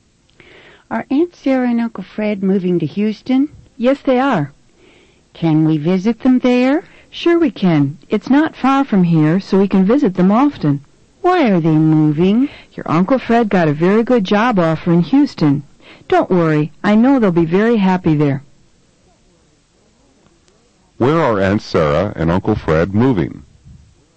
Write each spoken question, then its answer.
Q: Where are Aunt Sarah and Uncle Fred moving?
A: They're moving to Houston.